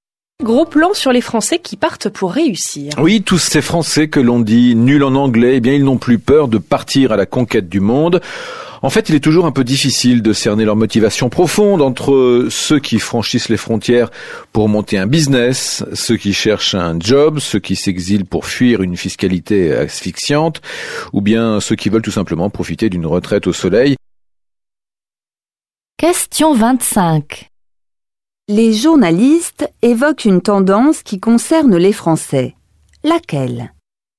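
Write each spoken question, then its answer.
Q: Les journalistes évoquent une tendance qui concerne les Français. Laquelle ?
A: De plus en plus de Français partent vivre à l'étranger (ils n'ont plus peur de partir à la conquête du monde).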